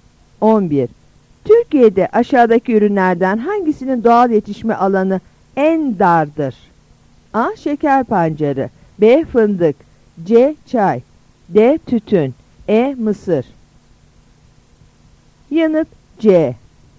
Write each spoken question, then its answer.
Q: Türkiye'de aşağıdaki ürünlerden hangisinin doğal yetişme alanı en dardır?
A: Yanıt C.